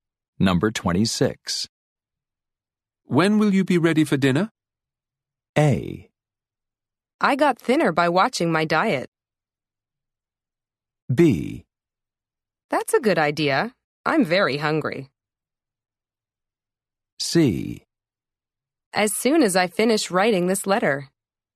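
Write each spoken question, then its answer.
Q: When will you be ready for dinner?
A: C: As soon as I finish writing this letter.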